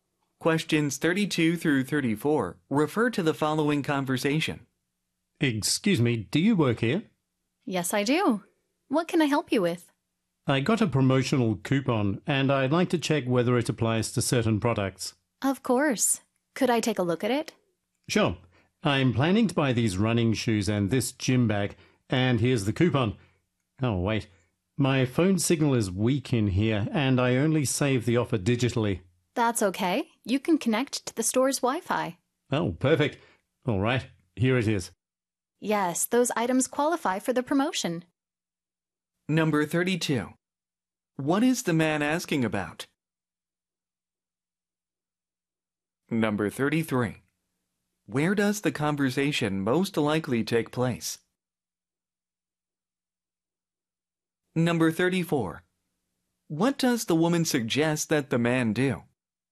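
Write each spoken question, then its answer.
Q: What is the man asking about?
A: Whether a coupon applies to certain products

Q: Where does the conversation most likely take place?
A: At a sporting goods store

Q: What does the woman suggest that the man do?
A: Connect to the store's Wi-Fi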